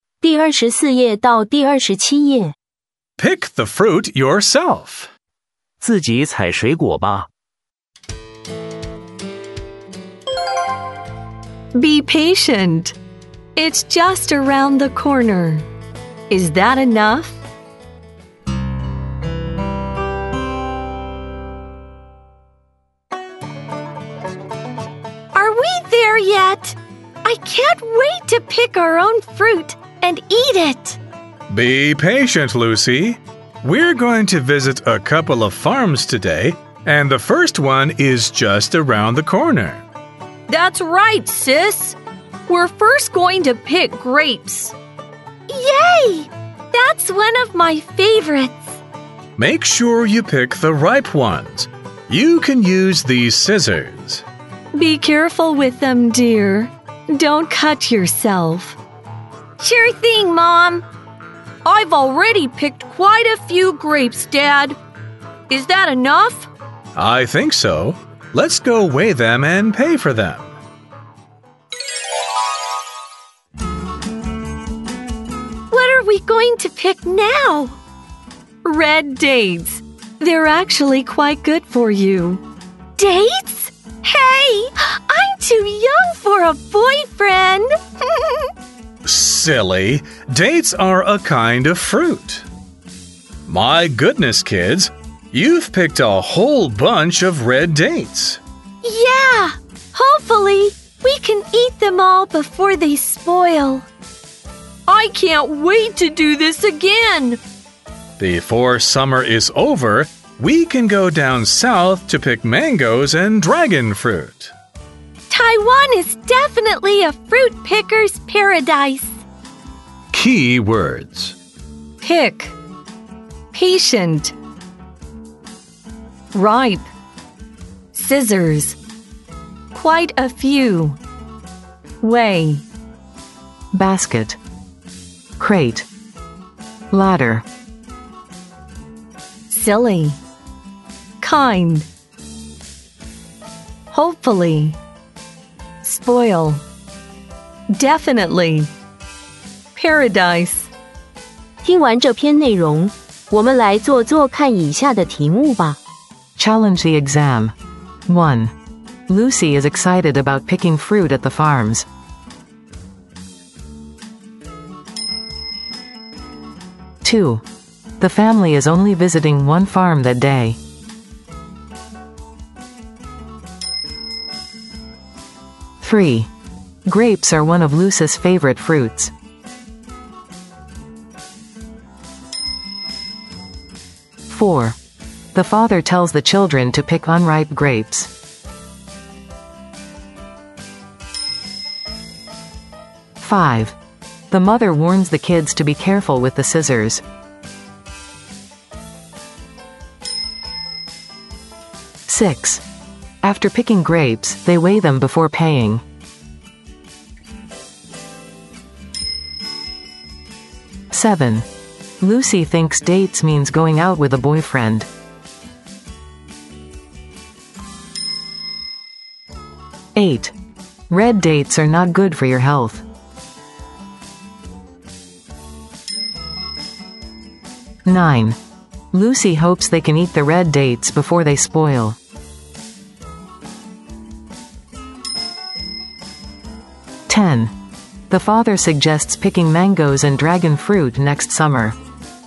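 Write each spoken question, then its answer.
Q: Lucy is excited about picking fruit at the farms.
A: True

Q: The family is only visiting one farm that day.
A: False

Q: Grapes are one of Lucy's favorite fruits.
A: True

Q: The father tells the children to pick unripe grapes.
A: False

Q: The mother warns the kids to be careful with the scissors.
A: True

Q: After picking grapes, they weigh them before paying.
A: True

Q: Lucy thinks dates means going out with a boyfriend.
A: True

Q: Red dates are not good for your health.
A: False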